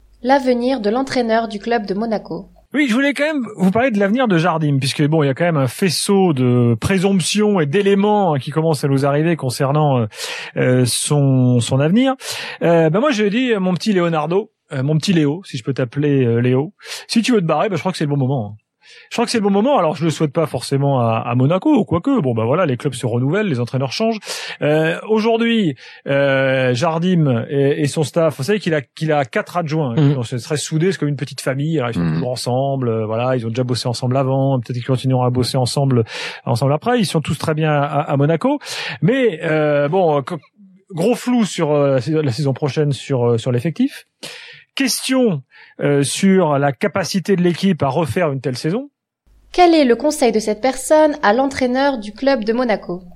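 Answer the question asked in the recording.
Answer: De partir maintenant, car c'est le bon moment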